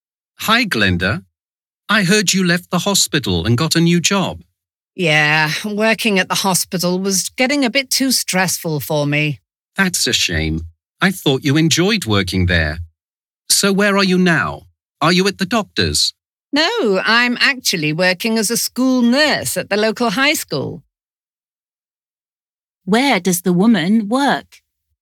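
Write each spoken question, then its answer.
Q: Where does the woman work?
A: at the local high school (as a school nurse)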